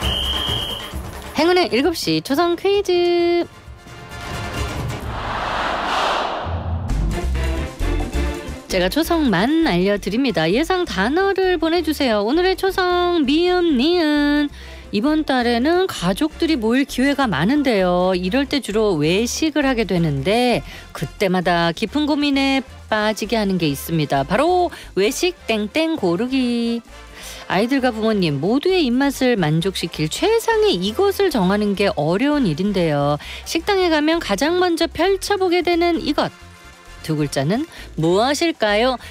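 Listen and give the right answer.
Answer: 메뉴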